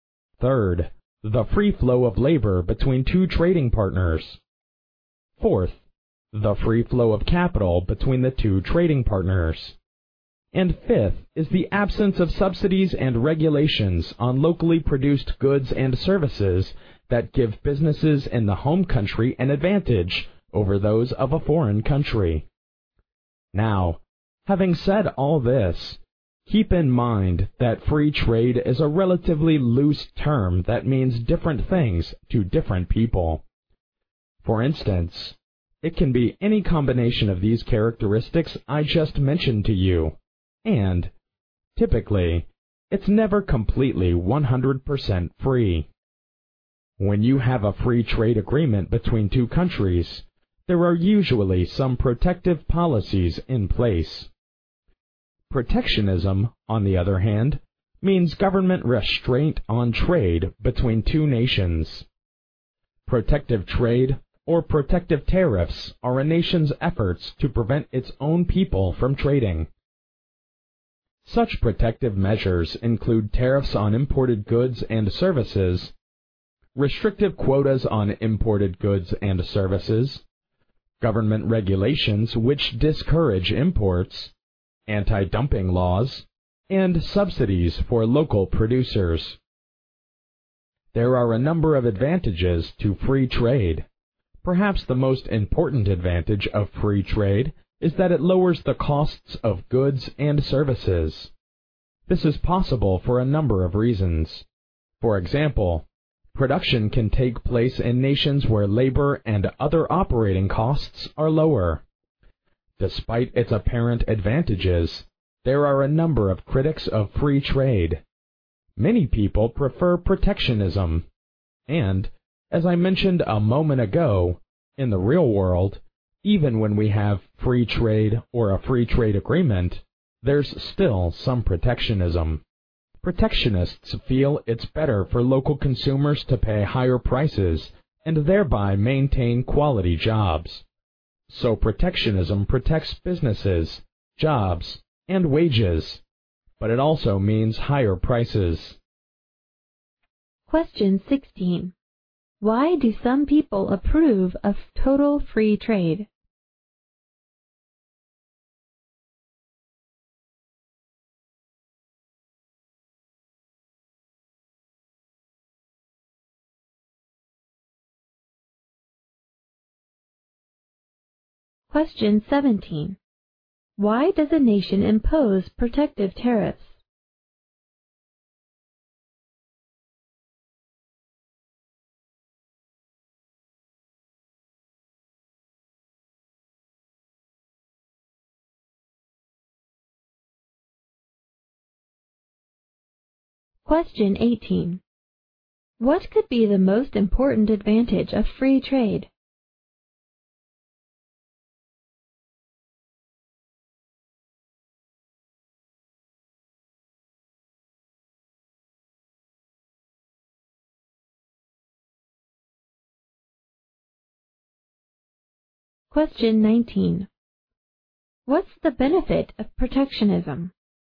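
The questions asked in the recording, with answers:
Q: What could be the most important advantage of free trade?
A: It lowers the costs of goods and services

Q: What's the benefit of protectionism?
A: It protects businesses, jobs and wages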